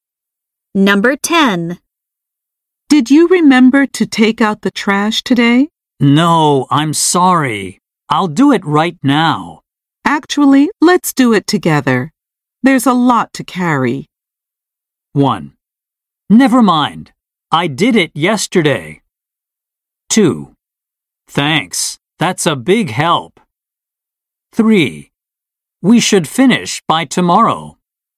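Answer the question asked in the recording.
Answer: 2: Thanks. That's a big help.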